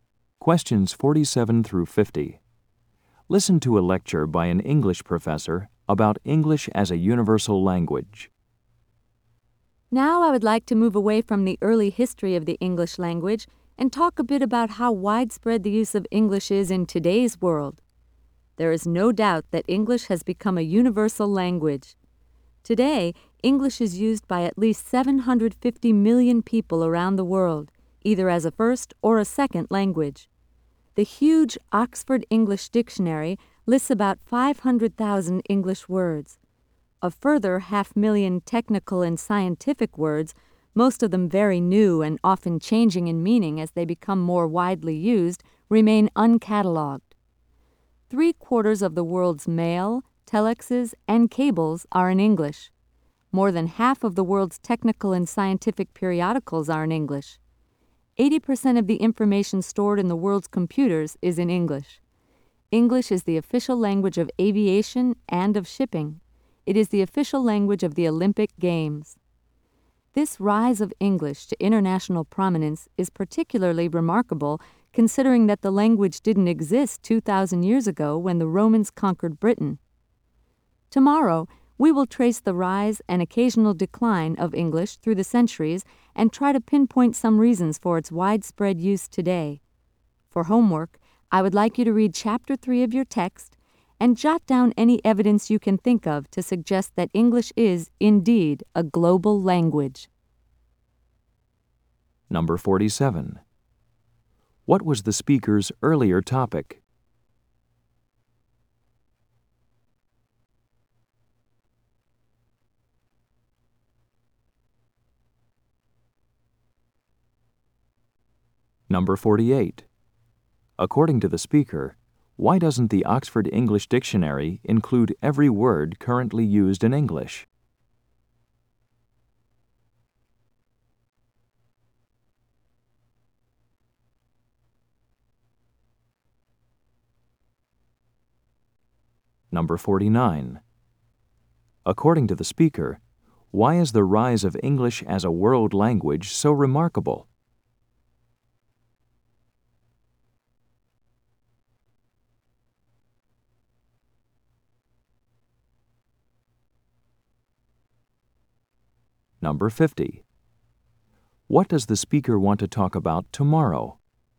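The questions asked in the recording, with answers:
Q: What was the speaker's earlier topic?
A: The early history of the English language

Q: According to the speaker, why doesn't the Oxford English Dictionary include every word currently used in English?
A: Many technical and scientific words are very new and change in meaning

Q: According to the speaker, why is the rise of English as a world language so remarkable?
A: The language didn't exist 2,000 years ago

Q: What does the speaker want to talk about tomorrow?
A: The rise and decline of English through the centuries and reasons for its widespread use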